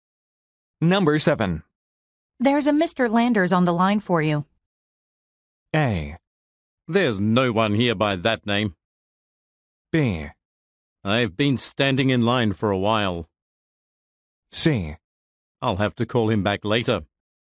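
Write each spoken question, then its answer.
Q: There's a Mr. Landers on the line for you.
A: C: I'll have to call him back later.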